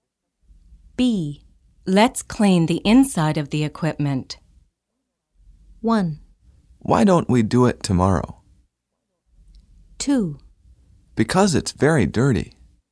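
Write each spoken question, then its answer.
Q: Let's clean the inside of the equipment.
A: 1: Why don't we do it tomorrow?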